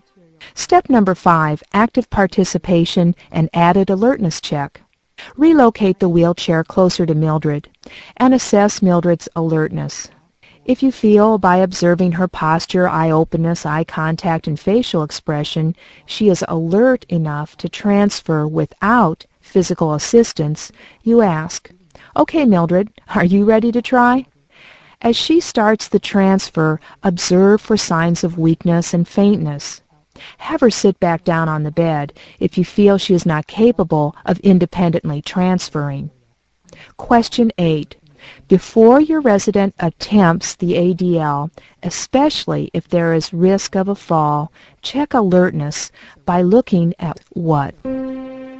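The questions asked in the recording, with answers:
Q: Before your resident attempts the ADL, especially if there is risk of a fall, check alertness by looking at what?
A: Posture, eye openness, eye contact and facial expression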